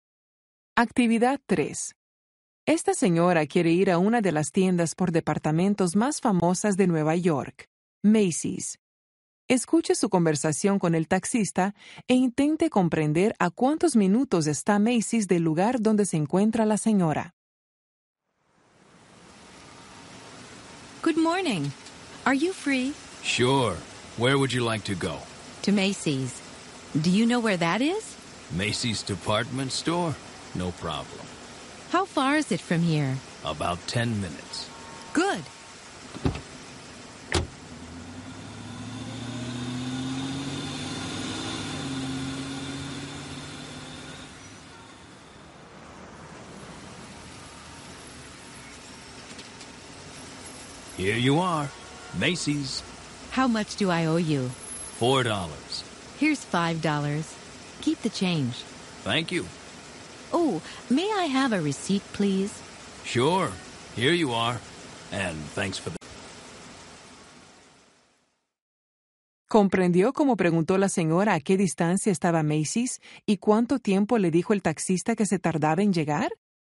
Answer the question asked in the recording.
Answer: About 10 minutes.